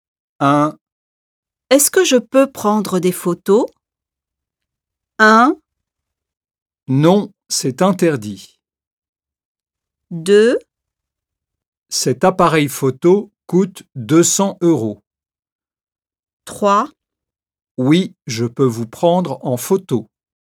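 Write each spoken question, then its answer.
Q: Est-ce que je peux prendre des photos?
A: 1: Non, c'est interdit.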